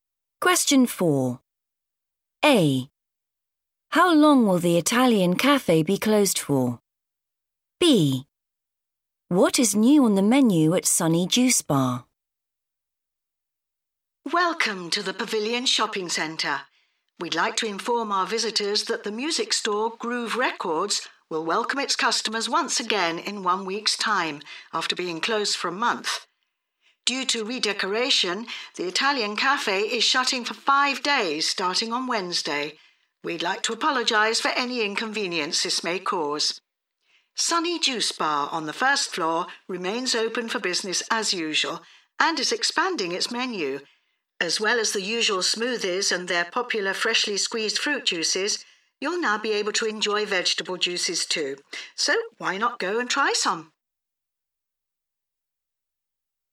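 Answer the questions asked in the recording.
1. 5 days
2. vegetable juices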